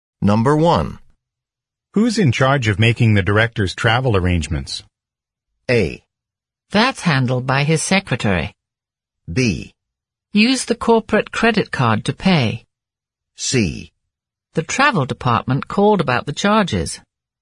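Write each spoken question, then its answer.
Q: Who's in charge of making the director's travel arrangements?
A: A: That's handled by his secretary.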